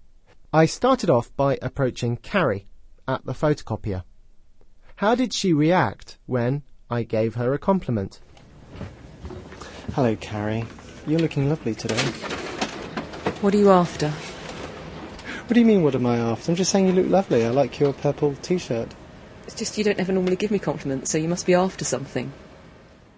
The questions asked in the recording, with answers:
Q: How did she react when I gave her a compliment?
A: When I told Carrie that I thought she looked lovely, she said, "What are you after?"